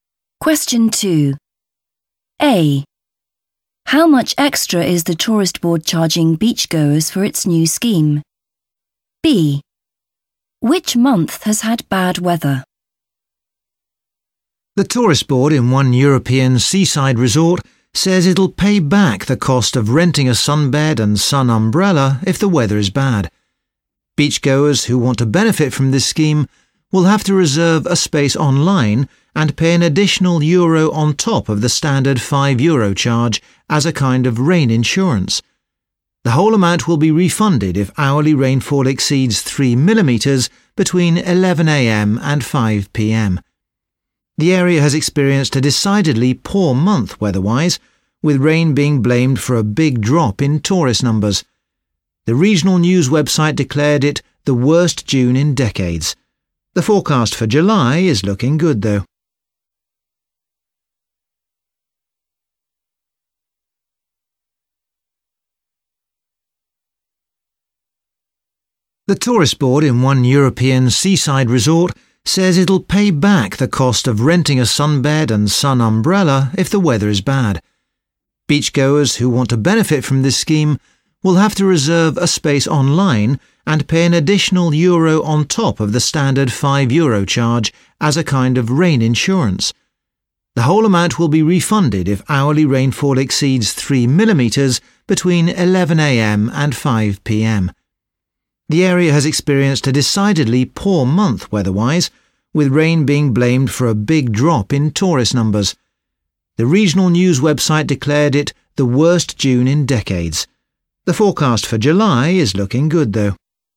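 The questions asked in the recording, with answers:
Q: How much extra is the tourist board charging beachgoers for its new scheme?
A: one euro

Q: Which month has had bad weather?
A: June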